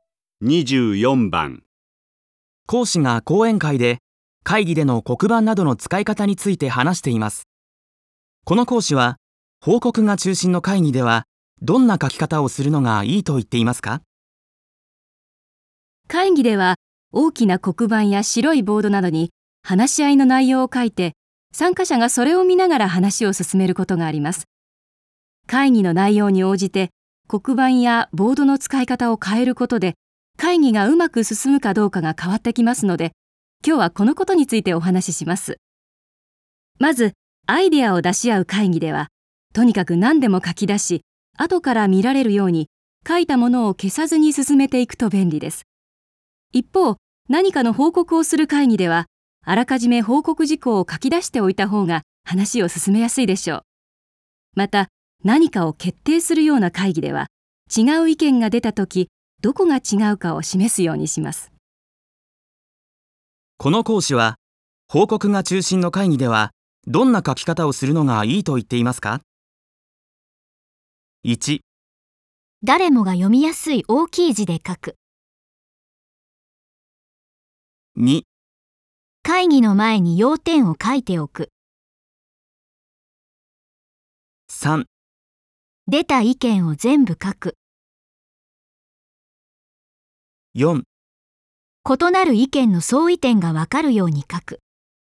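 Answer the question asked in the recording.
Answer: 2: 会議の前に要点を書いておく。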